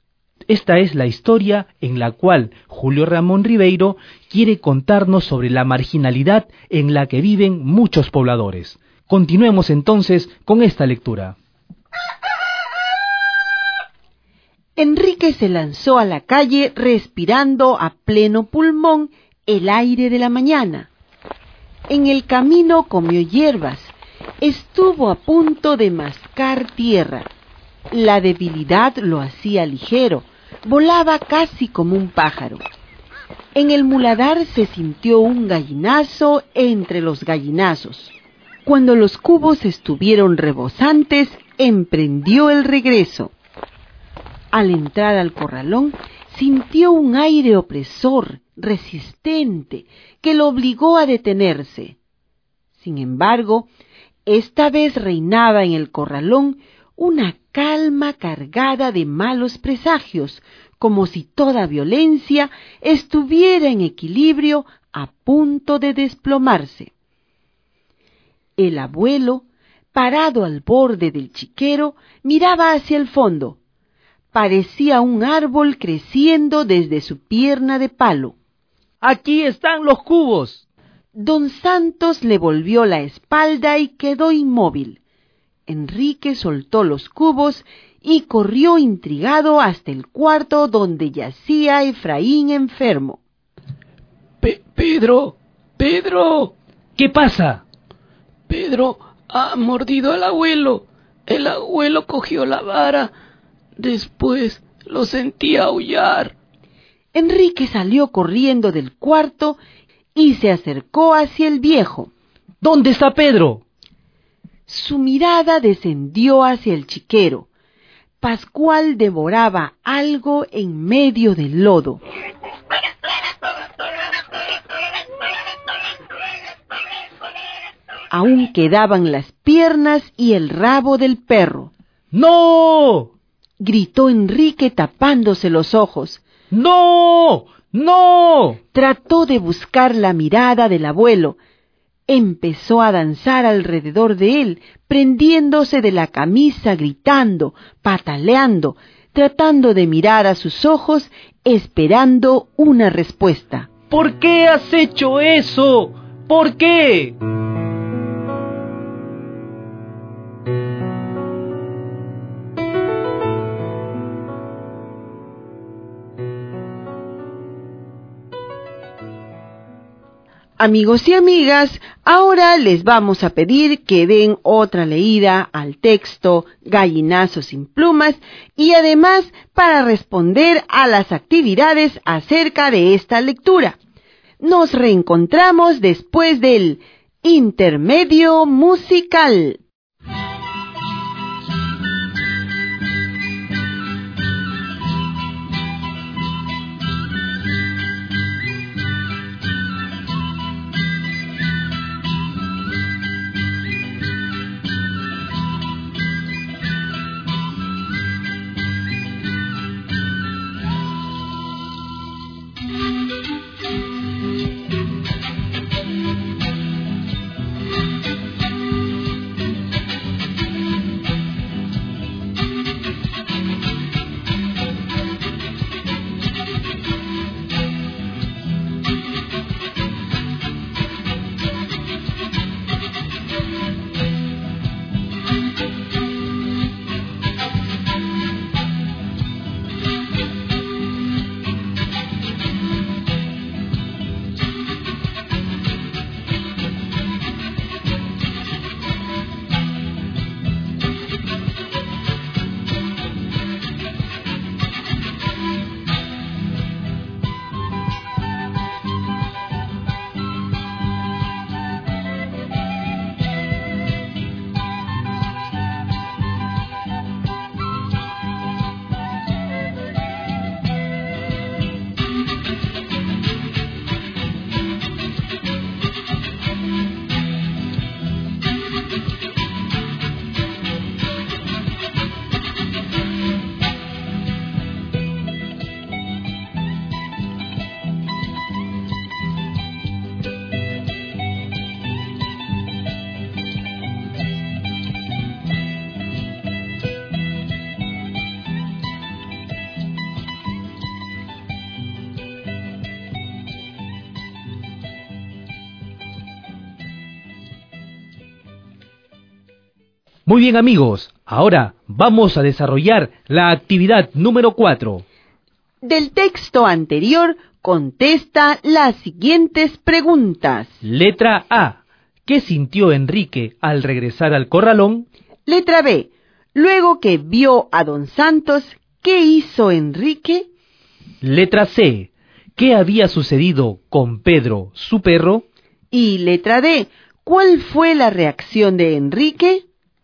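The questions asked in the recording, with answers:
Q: ¿Qué sintió Enrique al regresar al corralón?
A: Sintió un aire opresor, resistente, que lo obligó a detenerse

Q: Luego que vio a don Santos, ¿qué hizo Enrique?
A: Soltó los cubos y corrió al cuarto donde estaba Efraín enfermo

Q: ¿Qué había sucedido con Pedro, su perro?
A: Mordió al abuelo, el abuelo lo mató con la vara y el chancho Pascual se lo estaba comiendo

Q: ¿Cuál fue la reacción de Enrique?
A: Gritó, se tapó los ojos y le preguntó al abuelo por qué lo había hecho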